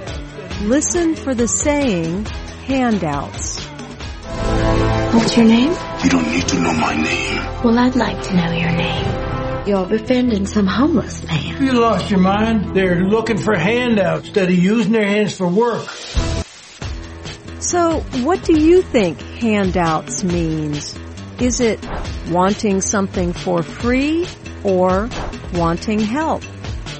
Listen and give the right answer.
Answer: Asking for a handout means wanting something for free.